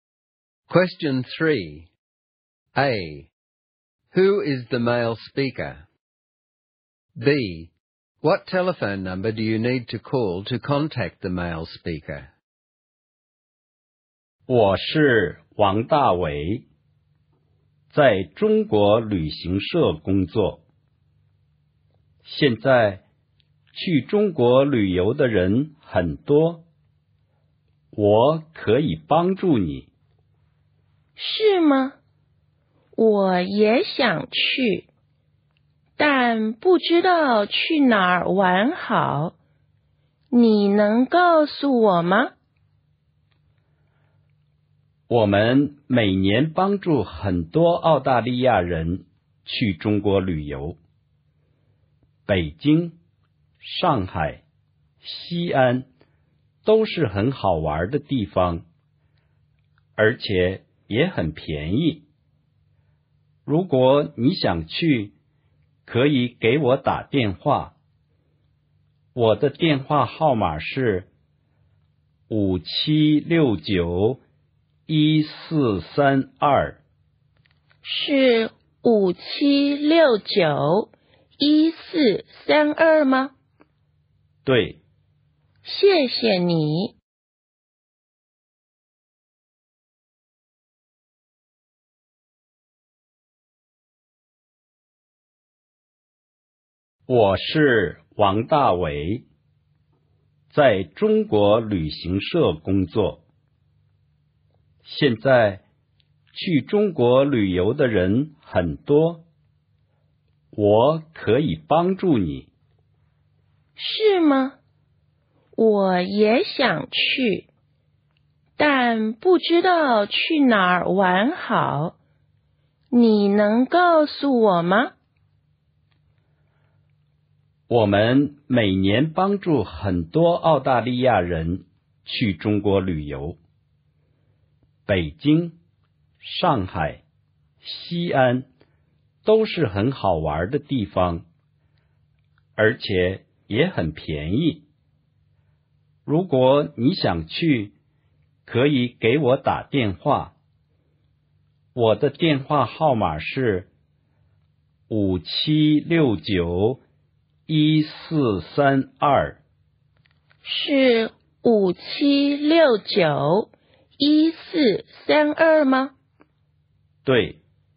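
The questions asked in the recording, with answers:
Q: Who is the male speaker?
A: Wang Dawei, who works at a China travel agency

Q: What telephone number do you need to call to contact the male speaker?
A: 5769-1432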